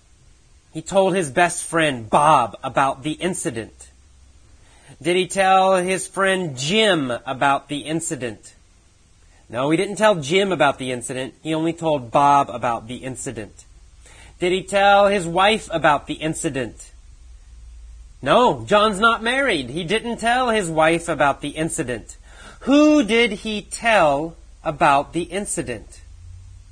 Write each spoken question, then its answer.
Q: Who did he tell about the incident?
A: He told Bob about the incident.